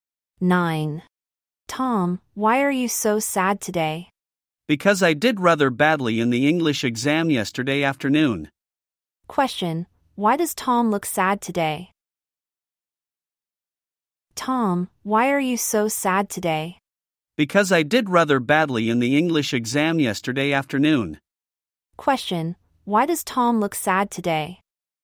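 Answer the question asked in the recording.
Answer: He did badly in the English exam yesterday afternoon.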